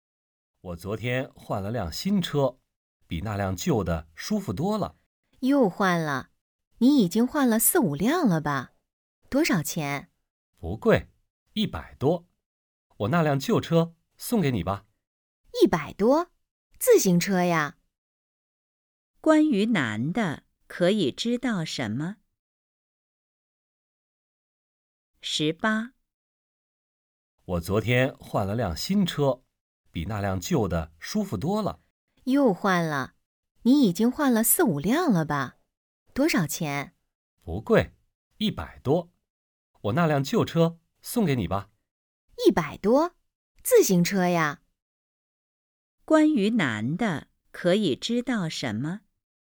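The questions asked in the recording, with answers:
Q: 关于男的,可以知道什么?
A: 他换了一辆新自行车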